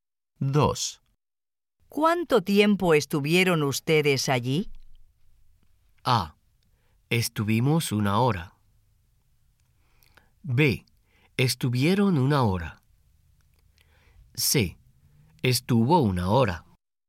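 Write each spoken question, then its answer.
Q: ¿Cuánto tiempo estuvieron ustedes allí?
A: A: Estuvimos una hora.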